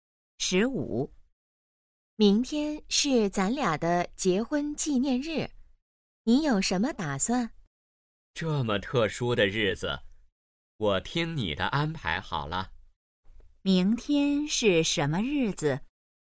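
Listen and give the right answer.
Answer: 结婚纪念日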